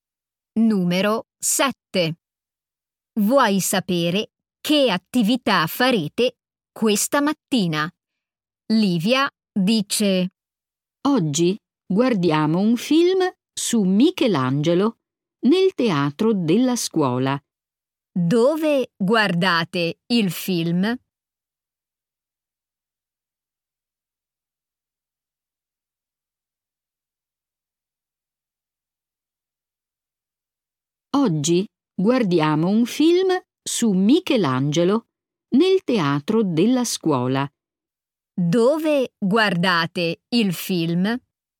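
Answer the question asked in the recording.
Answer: Nel teatro della scuola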